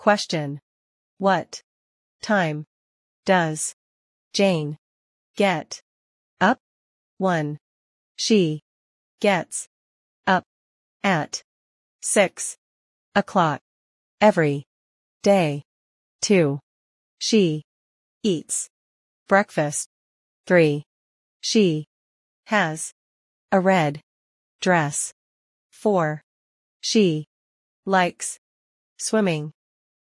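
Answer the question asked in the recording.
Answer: 1: She gets up at 6 o'clock every day.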